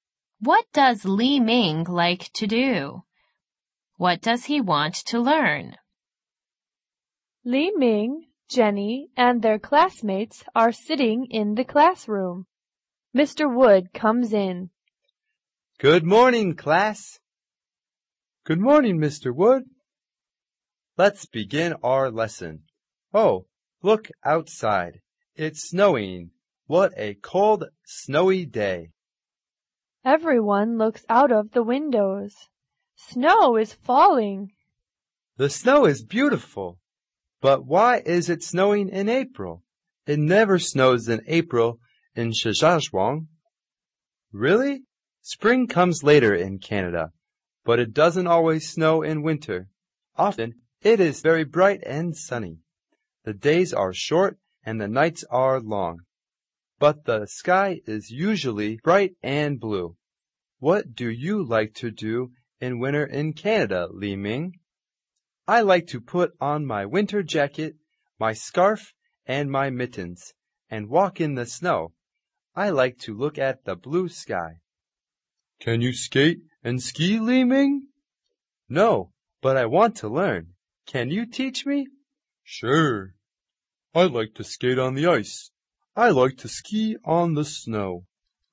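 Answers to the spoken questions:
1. Walk in the snow in his winter jacket, scarf and mittens, and look at the blue sky
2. To skate and ski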